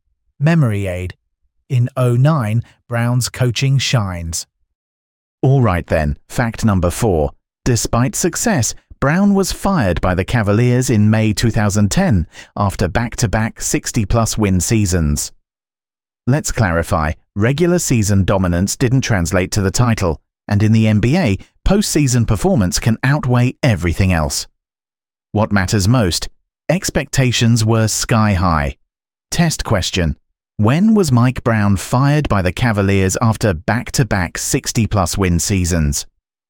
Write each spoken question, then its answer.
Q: When was Mike Brown fired by the Cavaliers after back-to-back 60-plus win seasons?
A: 2010.